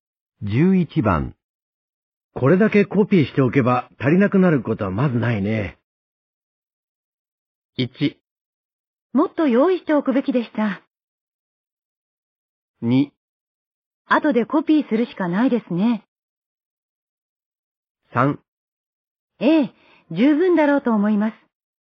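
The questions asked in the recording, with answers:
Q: これだけコピーしておけば足りなくなることはまずないね。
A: 3: ええ、十分だろうと思います。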